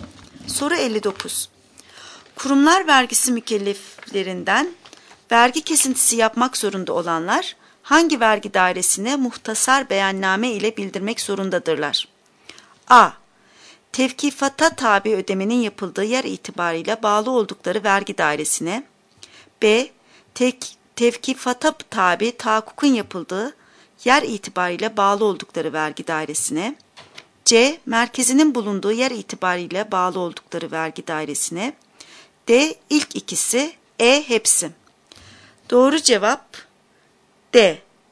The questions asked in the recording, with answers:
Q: Kurumlar vergisi mükelleflerinden vergi kesintisi yapmak zorunda olanlar hangi vergi dairesine muhtasar beyanname ile bildirmek zorundadırlar?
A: Doğru cevap D.